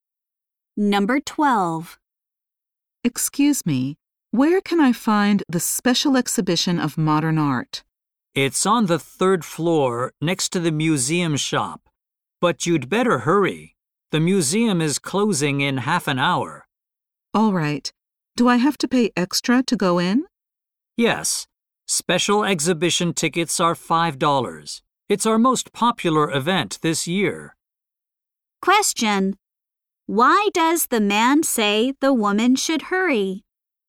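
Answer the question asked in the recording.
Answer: The museum is closing in half an hour.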